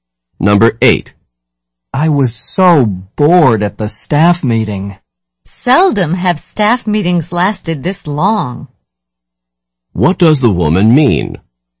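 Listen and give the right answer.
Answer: The staff meeting was unusually long.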